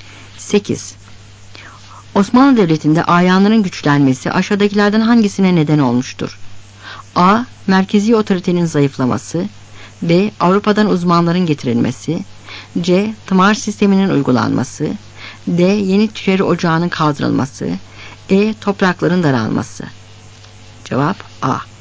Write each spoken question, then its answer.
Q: Osmanlı Devleti'nde ayanların güçlenmesi aşağıdakilerden hangisine neden olmuştur?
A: Cevap A.